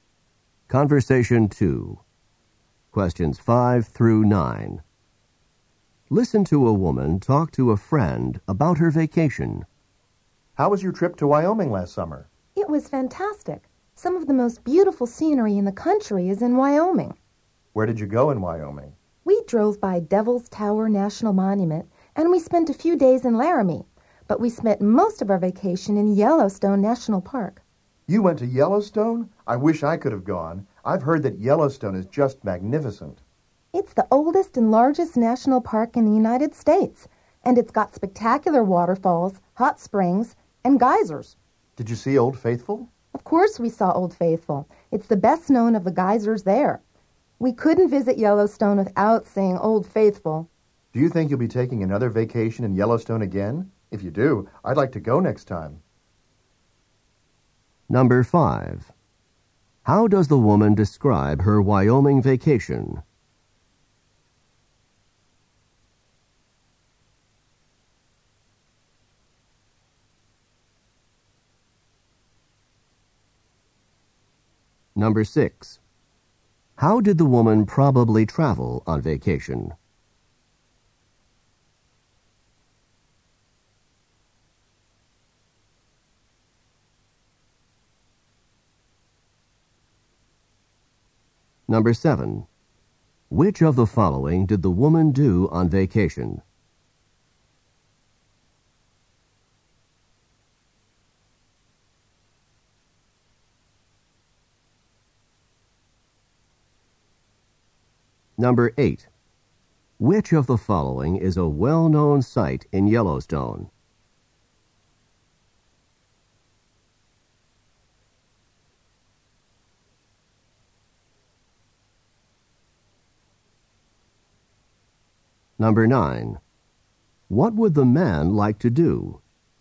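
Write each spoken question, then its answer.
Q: How does the woman describe her Wyoming vacation?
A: Fantastic

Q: How did the woman probably travel on vacation?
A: By car

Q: Which of the following is a well-known site in Yellowstone?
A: Old Faithful

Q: What would the man like to do?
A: Go to Yellowstone with her next time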